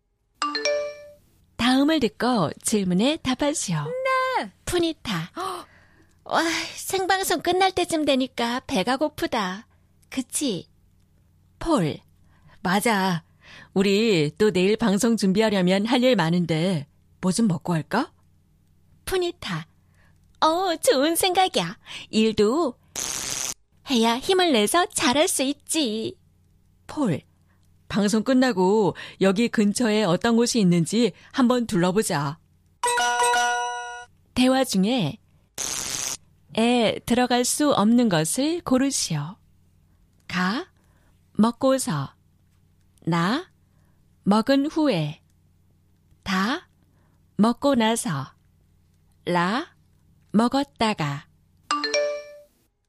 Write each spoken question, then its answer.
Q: 대화 중에 들어갈 수 없는 것을 고르시오.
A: Okay, the correct answer was la.